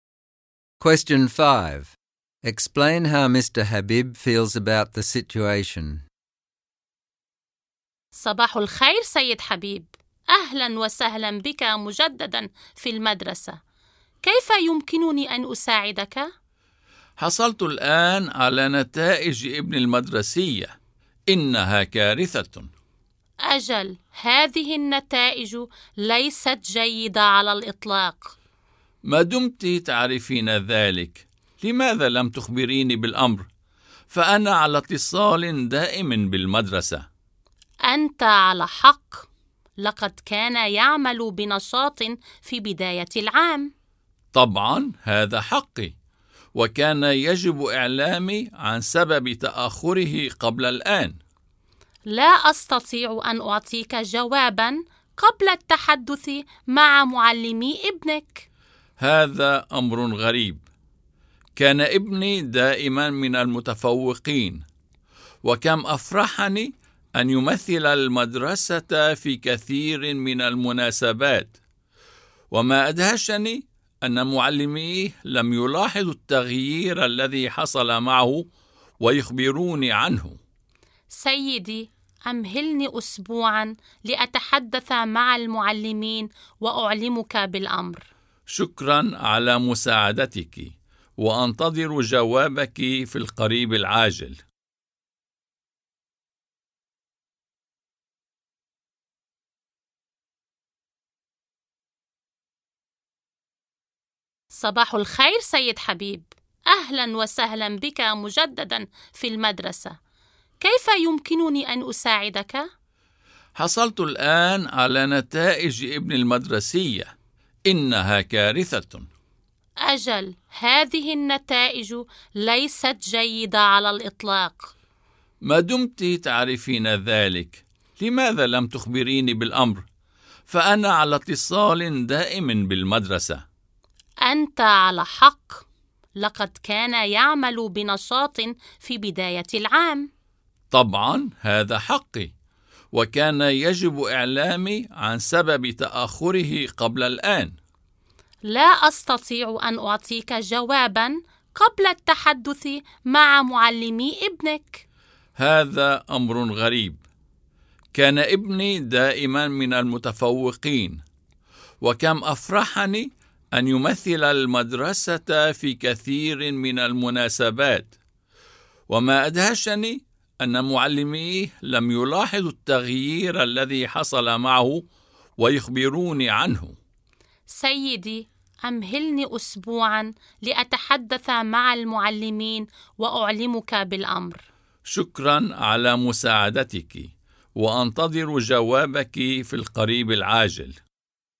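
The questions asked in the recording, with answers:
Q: Explain how Mr. Habib feels about the situation.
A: He is upset and angry that his son's results are a disaster and the school didn't tell him earlier, and surprised because his son was always a top student.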